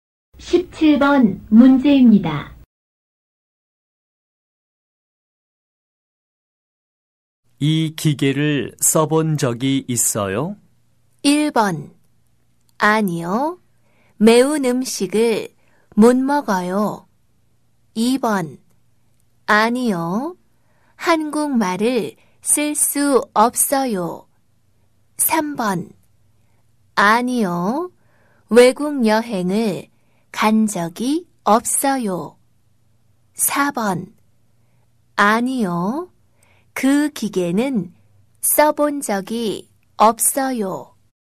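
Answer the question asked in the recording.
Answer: 4: 아니요. 그 기계는 써본 적이 없어요.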